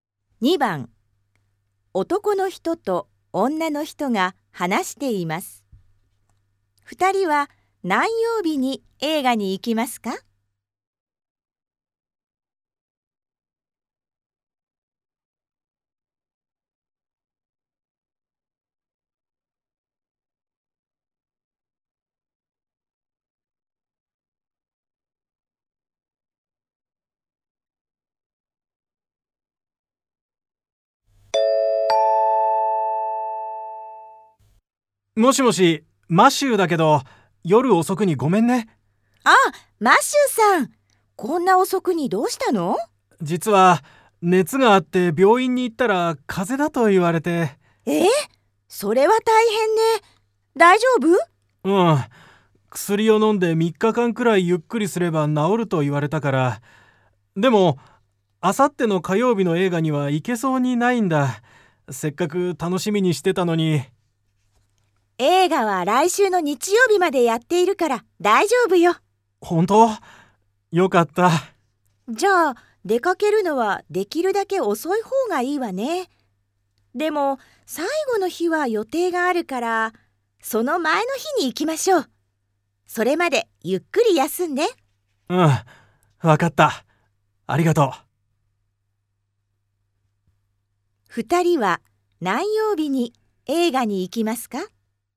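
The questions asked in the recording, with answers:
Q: 二人は何曜日に映画に行きますか?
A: 土曜日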